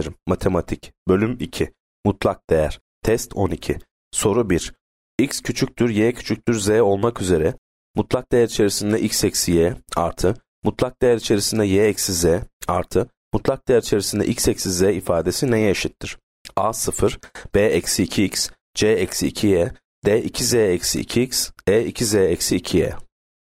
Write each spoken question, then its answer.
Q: X küçüktür, Y küçüktür, Z olmak üzere mutlak değer içerisinde X eksi Y artı mutlak değer içerisinde Y eksi Z artı mutlak değer içerisinde X eksi Z ifadesi neye eşittir?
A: Yanıt D. 2z eksi 2x.